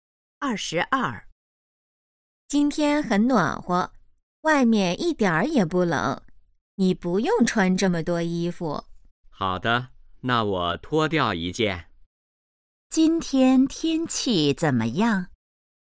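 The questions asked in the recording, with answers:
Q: 今天天气怎么样?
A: 很暖和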